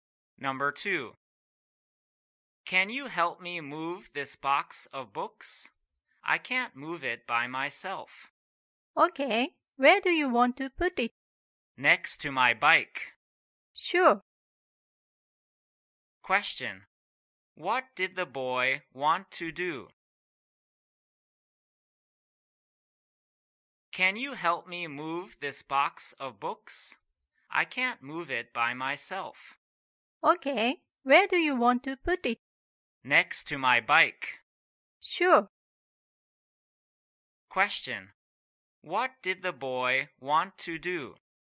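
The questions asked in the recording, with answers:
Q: What did the boy want to do?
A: Move a box of books next to his bike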